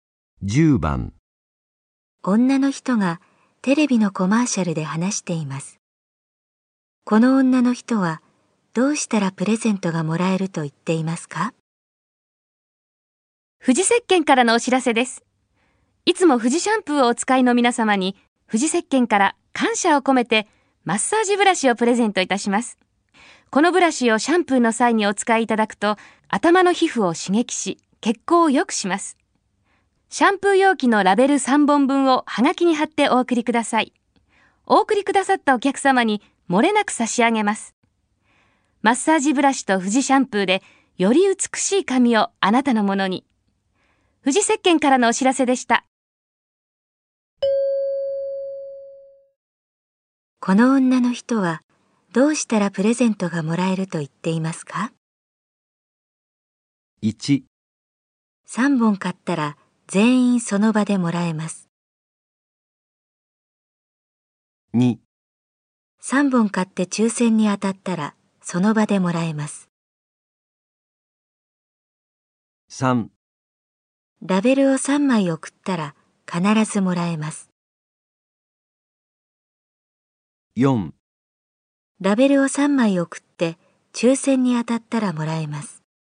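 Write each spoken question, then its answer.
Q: がもらえると言っていますか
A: 3: ラベルを3枚送ったら必ずもらえます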